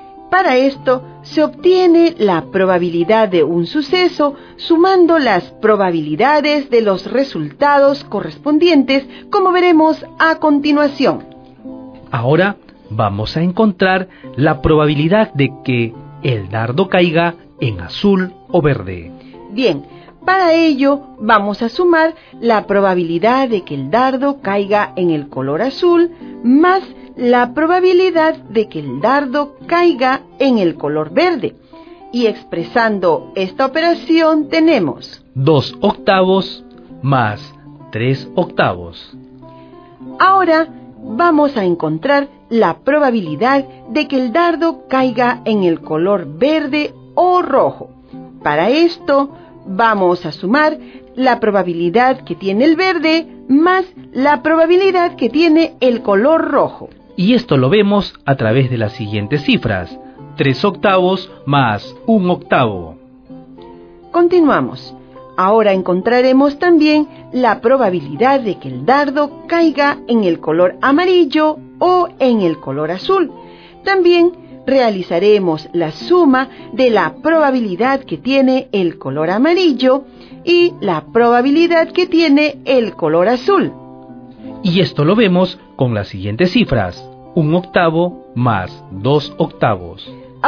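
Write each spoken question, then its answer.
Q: Ahora vamos a encontrar la probabilidad de que el dardo caiga en azul o verde.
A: 5/8

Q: Ahora vamos a encontrar la probabilidad de que el dardo caiga en el color verde o rojo.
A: 4/8 = 1/2

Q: Continuamos. Ahora encontraremos también la probabilidad de que el dardo caiga en el color amarillo o en el color azul.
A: 3/8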